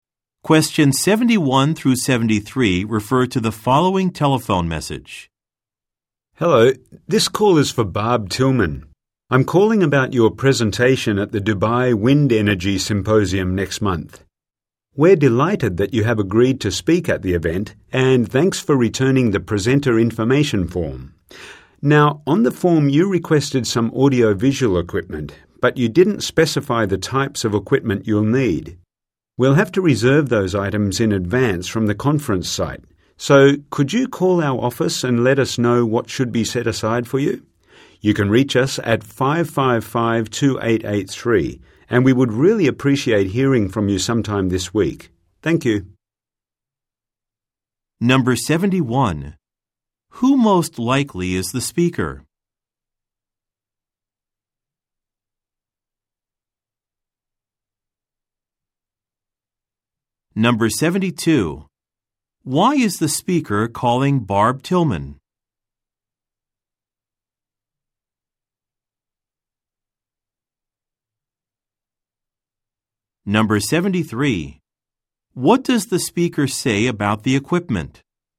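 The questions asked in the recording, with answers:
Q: Who most likely is the speaker?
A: An organizer of the Dubai Wind Energy Symposium

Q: Why is the speaker calling Barb Tillman?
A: To ask which audiovisual equipment she needs for her presentation

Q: What does the speaker say about the equipment?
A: It must be reserved in advance from the conference site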